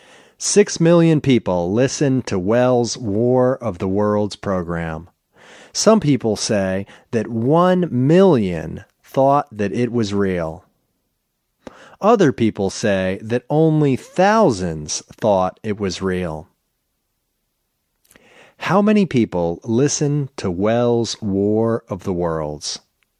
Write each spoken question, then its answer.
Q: How many people listened to Welles' War of the Worlds?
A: Six million people listened to Welles' War of the Worlds.